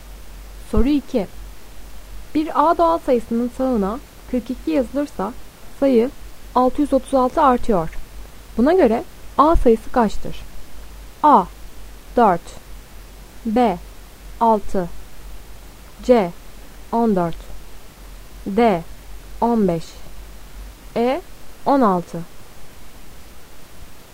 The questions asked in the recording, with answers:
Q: Buna göre A sayısı kaçtır?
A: Doğru cevap B. 6